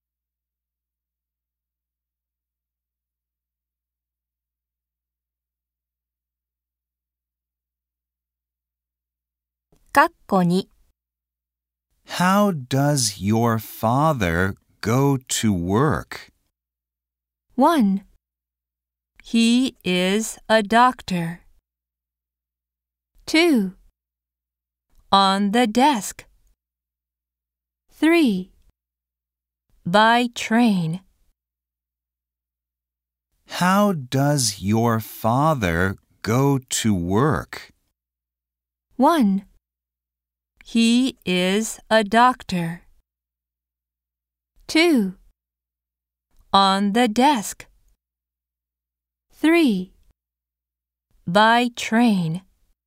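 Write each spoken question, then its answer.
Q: How does your father go to work?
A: 3: By train.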